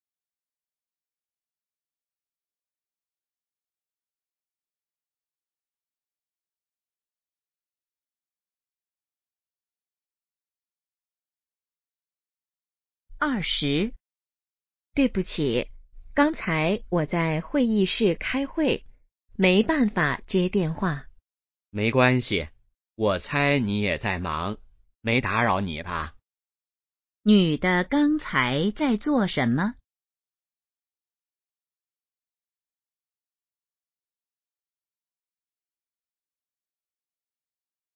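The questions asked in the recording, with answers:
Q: 女的刚才在做什么?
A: 开会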